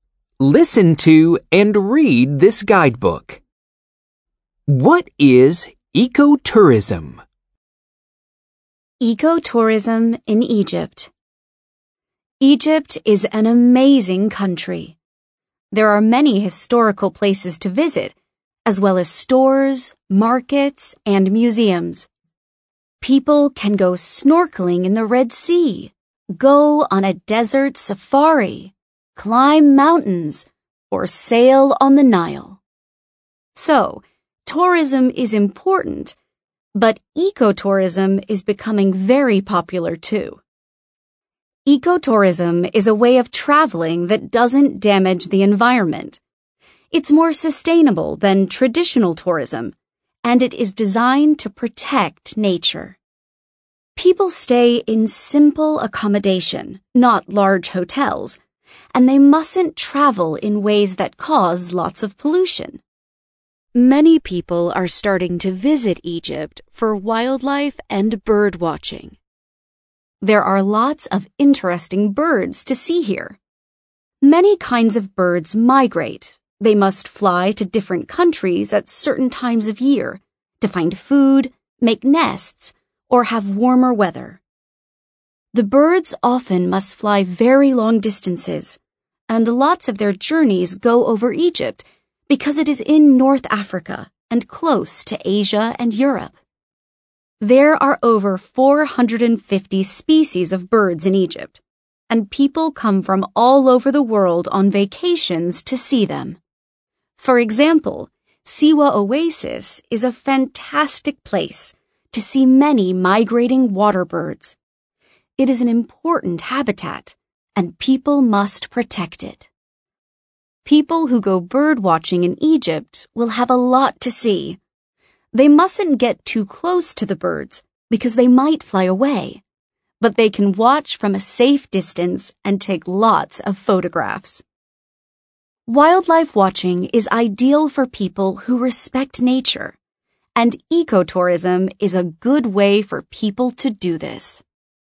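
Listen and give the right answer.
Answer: A way of traveling that doesn't damage the environment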